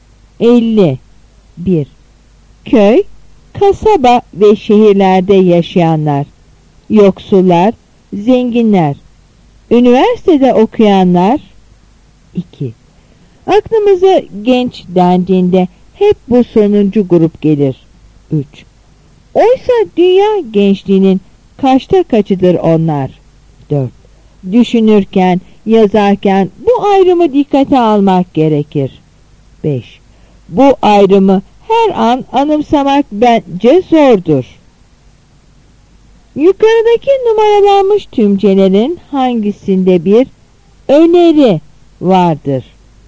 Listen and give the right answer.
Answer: Yanıt B.